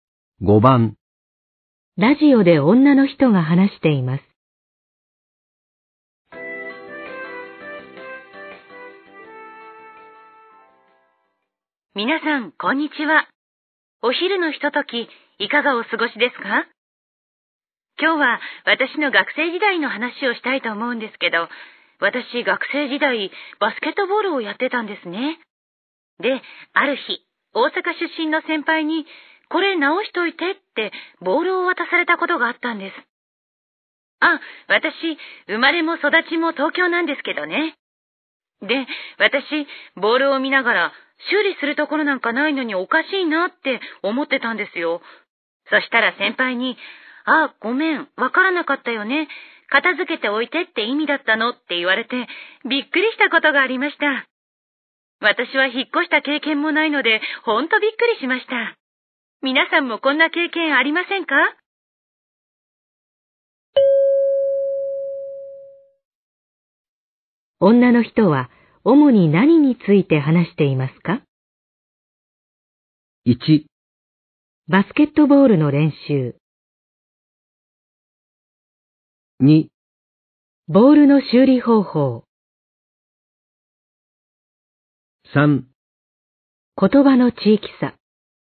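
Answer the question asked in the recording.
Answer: 3: 言葉の地域差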